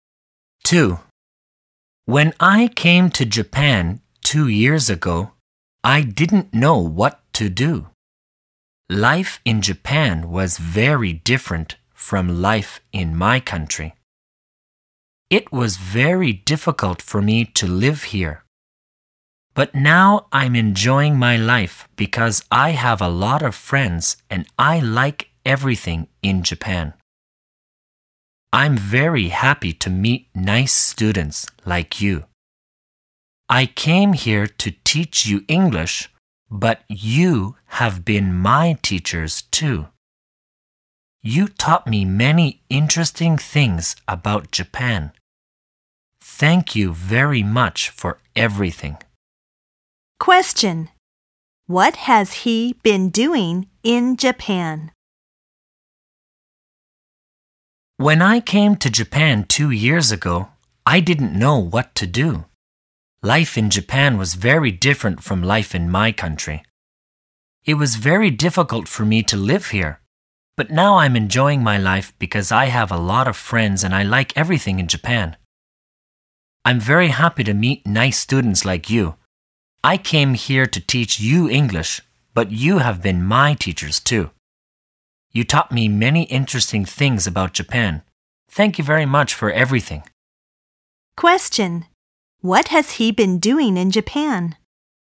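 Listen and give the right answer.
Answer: Teaching English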